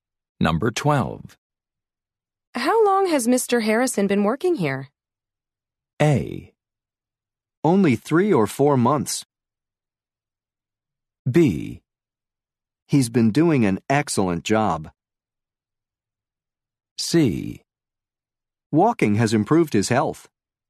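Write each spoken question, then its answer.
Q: How long has Mr. Harrison been working here?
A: A: Only three or four months.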